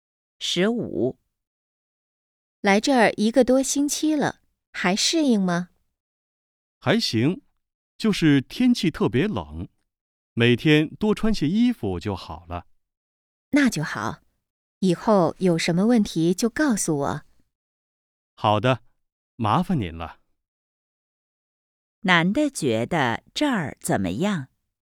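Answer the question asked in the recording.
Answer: 天气特别冷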